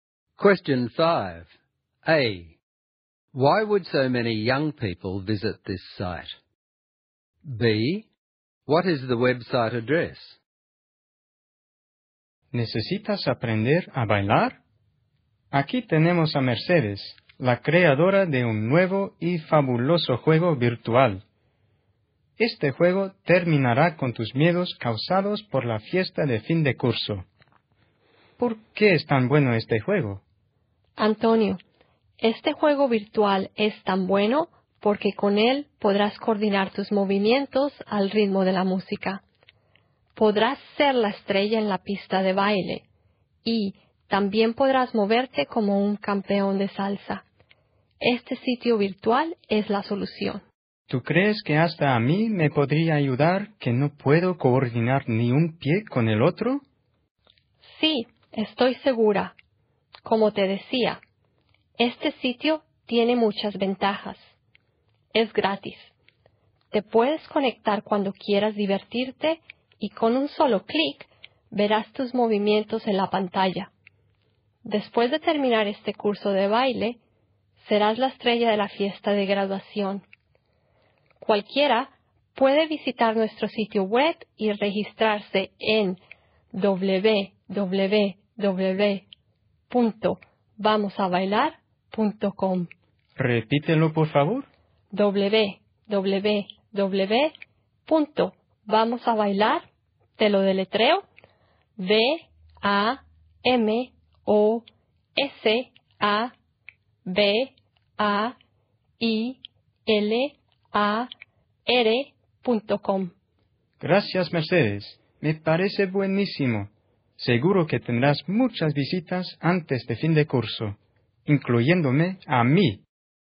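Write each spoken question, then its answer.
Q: A. Why would so many young people visit this site?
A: To learn to dance before the end-of-year graduation party. The site is free, they can log on whenever they like, and they can see their movements on screen.

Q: B. What is the website address?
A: www.vamosabailar.com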